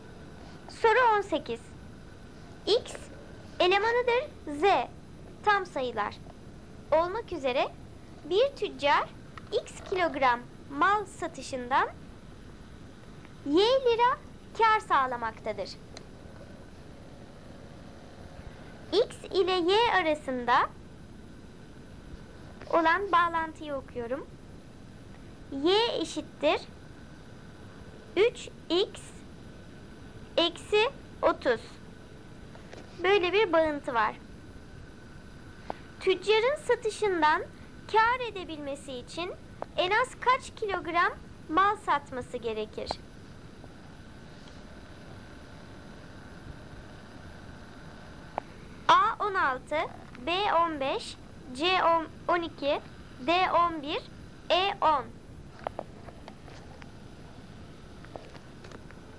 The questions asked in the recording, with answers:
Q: Tüccarın satışından kâr edebilmesi için en az kaç kilogram mal satması gerekir?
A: Doğru cevap D 11.